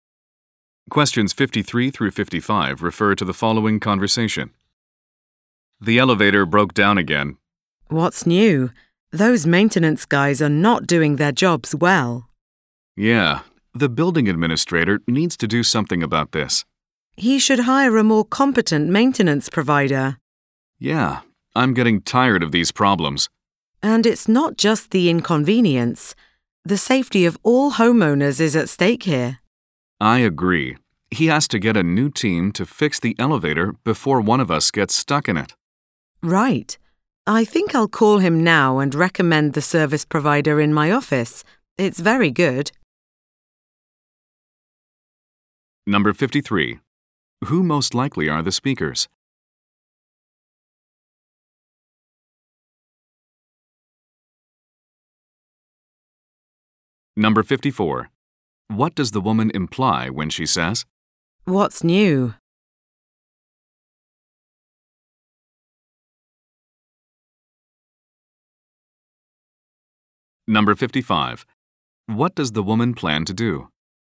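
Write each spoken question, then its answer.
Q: Who most likely are the speakers?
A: Residents (homeowners) of the building

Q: What does the woman imply when she says?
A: The elevator breaks down often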